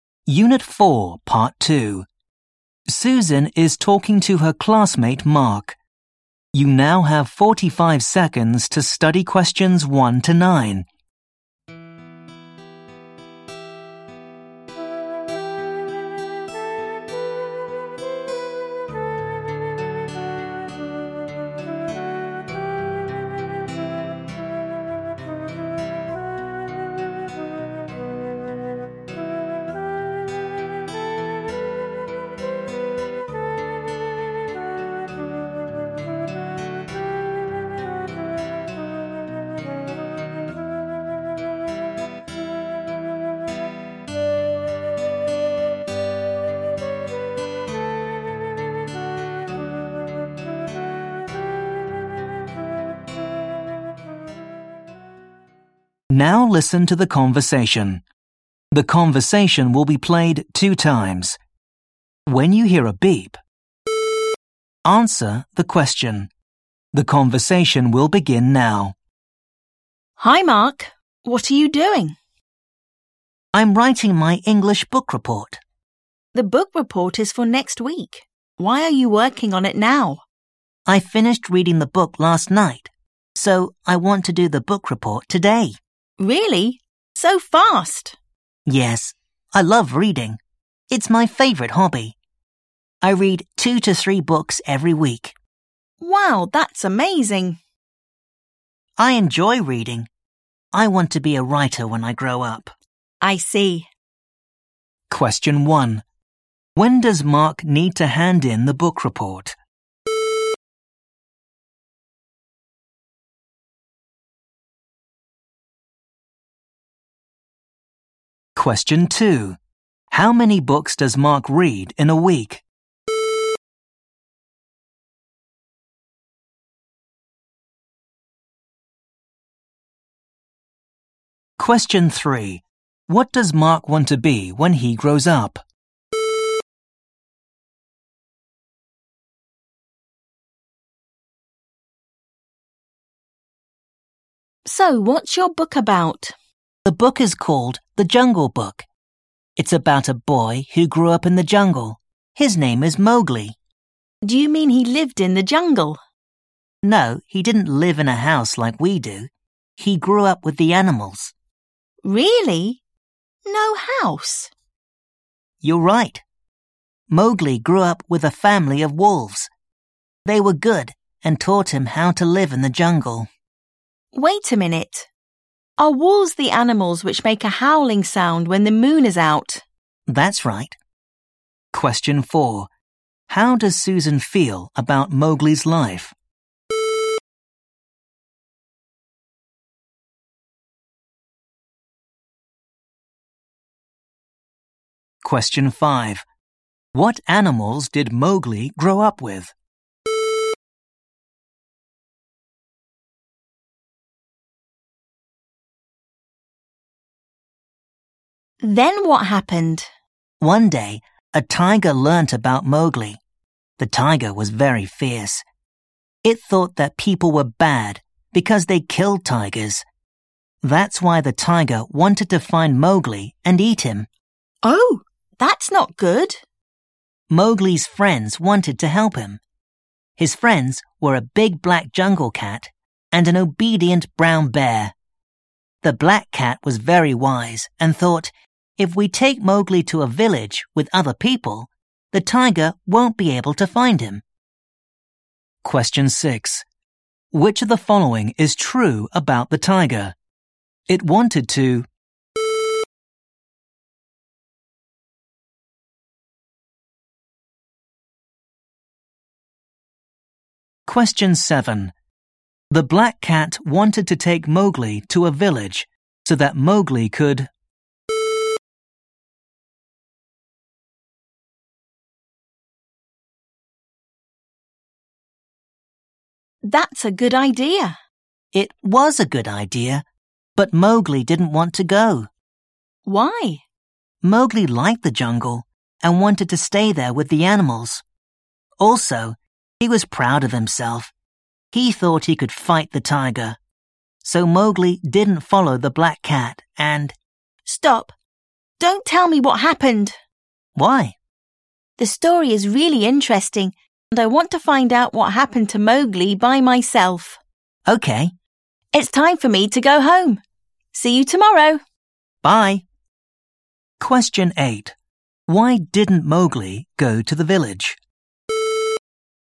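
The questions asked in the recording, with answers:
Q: When does Mark need to hand in the book report?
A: Next week

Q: How many books does Mark read in a week?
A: 2 to 3 books

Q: What does Mark want to be when he grows up?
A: A writer

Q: What animals did Mowgli grow up with?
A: A family of wolves

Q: Why didn't Mowgli go to the village?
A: He liked the jungle, wanted to stay with the animals, and thought he could fight the tiger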